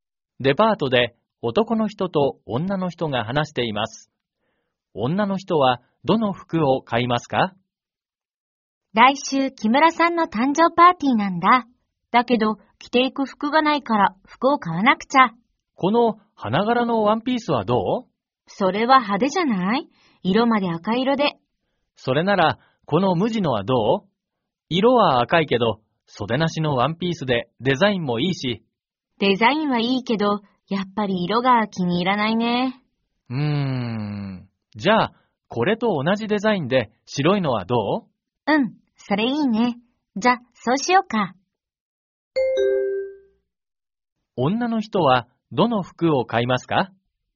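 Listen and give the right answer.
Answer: 白い無地の袖なしワンピース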